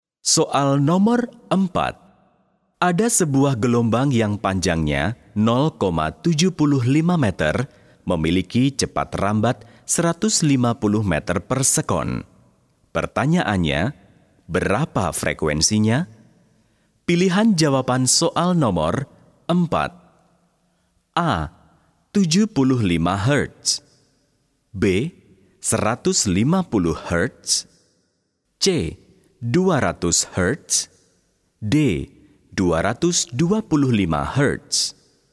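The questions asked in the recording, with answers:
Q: Pertanyaannya, berapa frekuensinya?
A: C: 200 Hz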